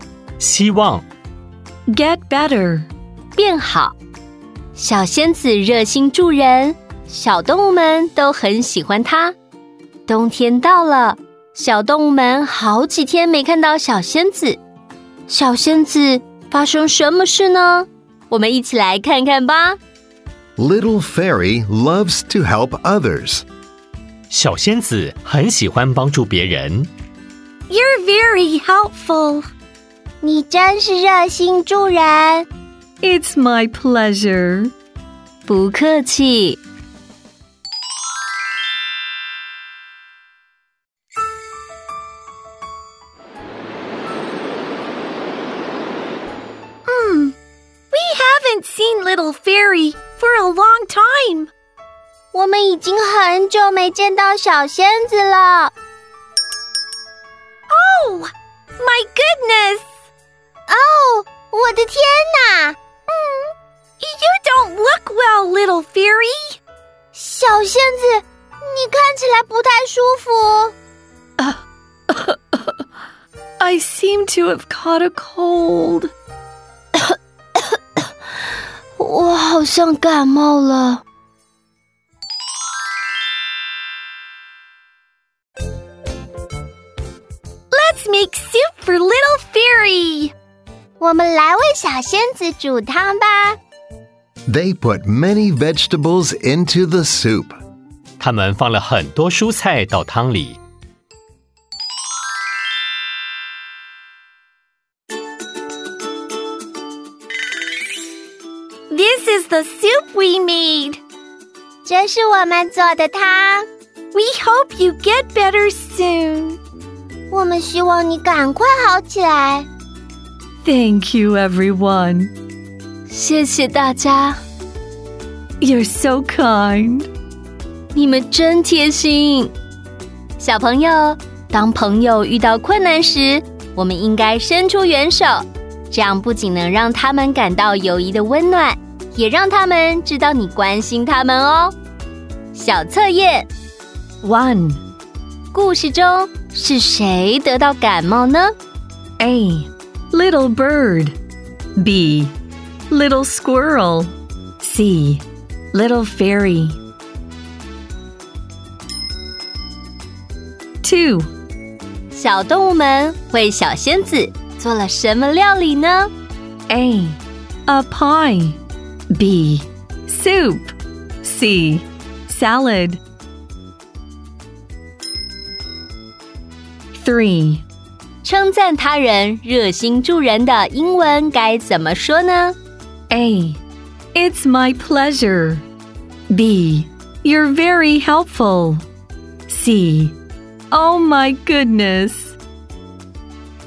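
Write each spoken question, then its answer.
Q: 故事中是谁得到感冒呢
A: C: Little fairy.

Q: 小动物们为小仙子。做了什么料理呢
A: B: Soup.

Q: 称赞他人热心助人的英文该怎么说呢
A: B: You're very helpful.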